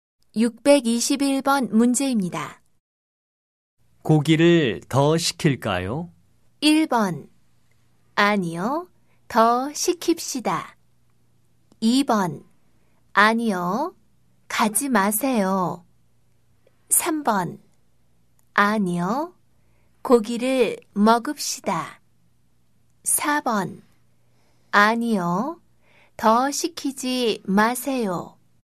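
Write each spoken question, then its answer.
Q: 고기를 더 시킬까요?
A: 4: 아니요, 더 시키지 마세요.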